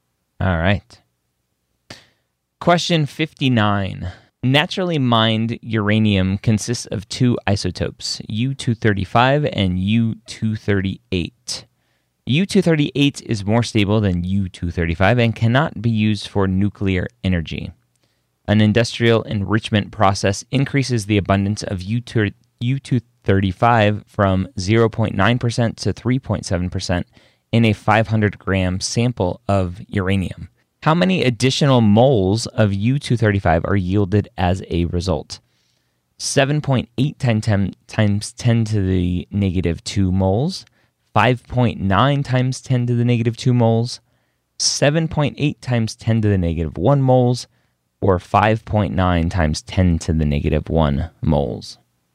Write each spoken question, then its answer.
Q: How many additional moles of U-235 are yielded as a result?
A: And you get some math and the answer's B.